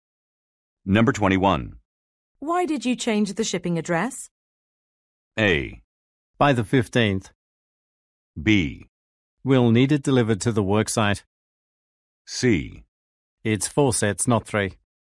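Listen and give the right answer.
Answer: B: We'll need it delivered to the worksite.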